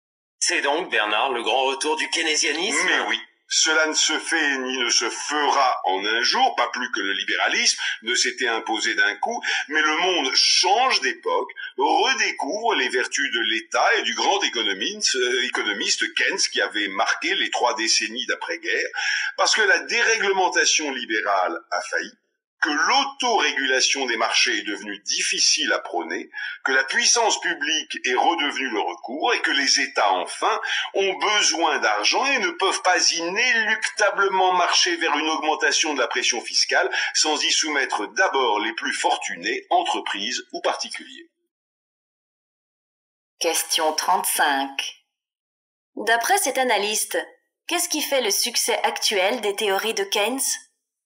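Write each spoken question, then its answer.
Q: D'après cet analyste, qu'est-ce qui fait le succès actuel des théories de Keynes ?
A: L'échec de la déréglementation libérale : l'autorégulation des marchés est devenue difficile à défendre, l'État redevient le recours et les États ont besoin d'argent.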